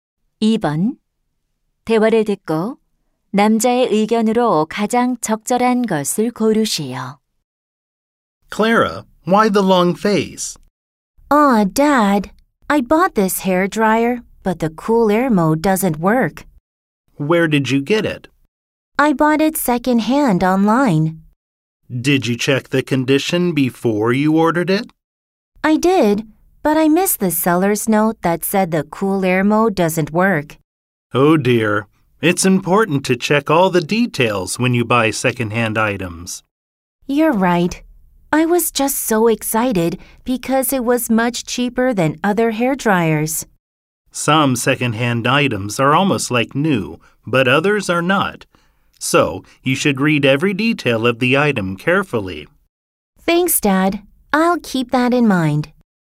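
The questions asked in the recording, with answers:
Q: 대화를 듣고 남자의 의견으로 가장 적절한 것을 고르시오.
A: 중고 물품을 살 때는 세부 사항을 꼼꼼히 확인해야 한다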